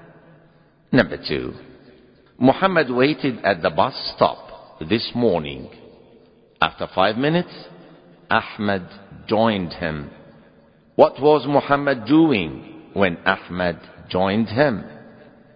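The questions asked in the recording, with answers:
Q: What was Muhammad doing when Ahmed joined him?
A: He was waiting at the bus stop.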